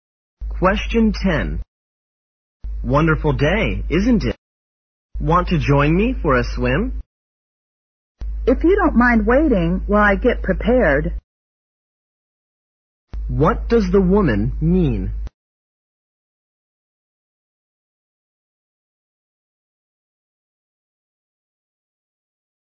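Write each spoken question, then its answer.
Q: What does the woman mean?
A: She will join him if he waits while she gets ready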